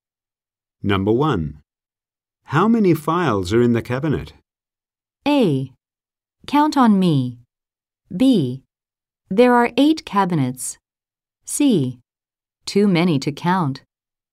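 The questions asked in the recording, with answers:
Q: How many files are in the cabinet?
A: C: Too many to count.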